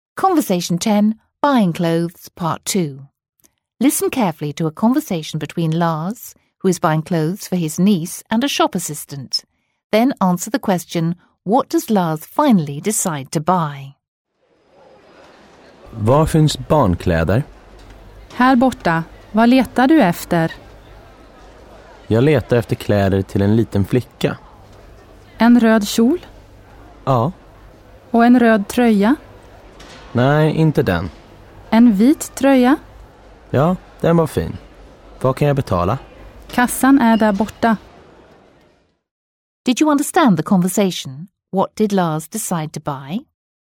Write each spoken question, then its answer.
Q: What did Lars decide to buy?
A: Lars decided to buy a red skirt and a white top.